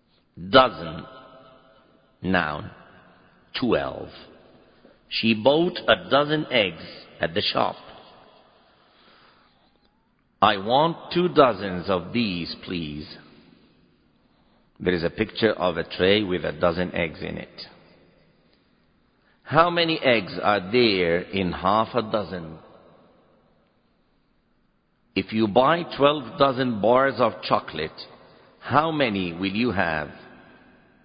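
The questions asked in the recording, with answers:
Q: If you buy 12 dozen bars of chocolate, how many will you have?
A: 144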